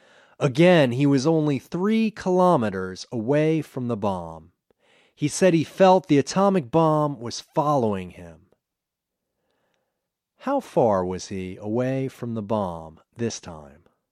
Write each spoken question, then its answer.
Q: How far was he away from the bomb this time?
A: This time he was only 3 kilometers away from the bomb.